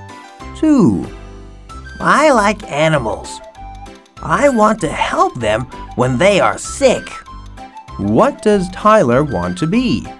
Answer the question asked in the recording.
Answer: He wants to be a vet.